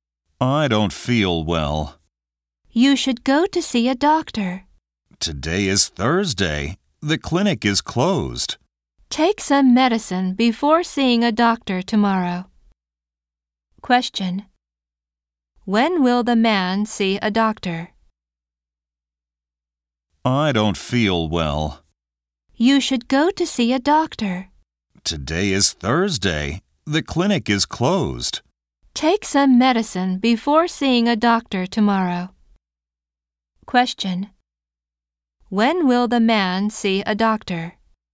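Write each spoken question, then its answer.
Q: When will the man see a doctor?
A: Tomorrow (Friday)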